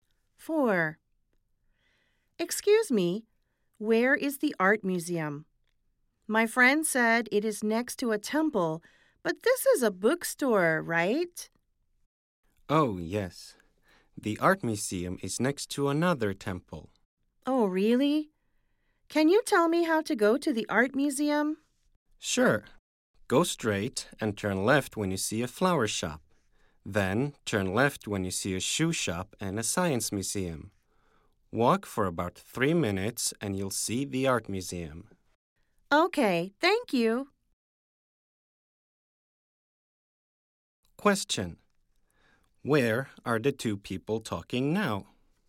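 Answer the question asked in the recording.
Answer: At a bookstore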